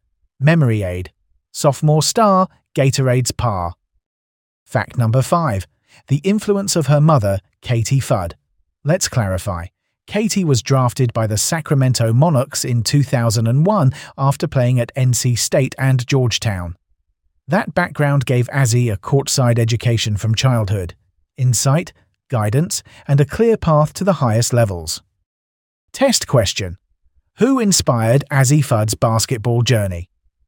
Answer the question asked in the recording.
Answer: Correct answer, her mother, Katie Fudd.